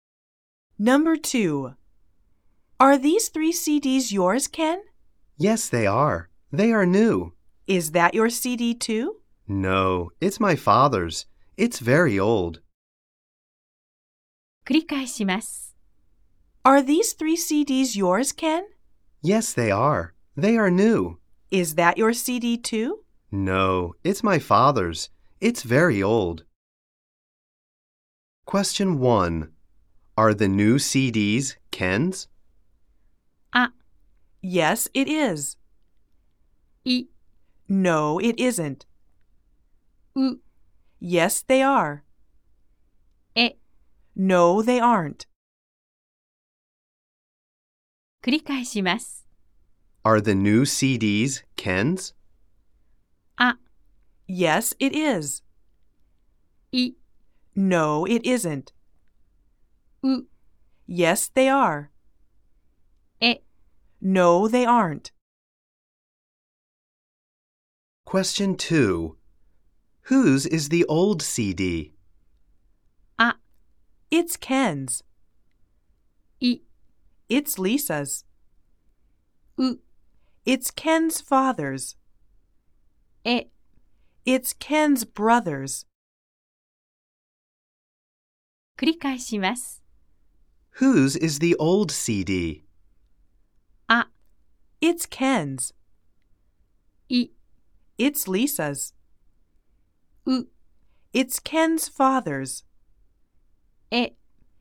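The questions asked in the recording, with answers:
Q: Are the new CDs Ken's?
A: う: Yes, they are.

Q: Whose is the old CD?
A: う: It's Ken's father's.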